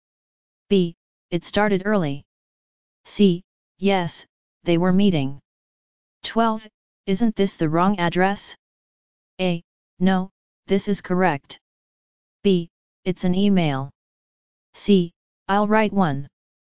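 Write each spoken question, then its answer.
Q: Isn't this the wrong address?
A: A: No, this is correct.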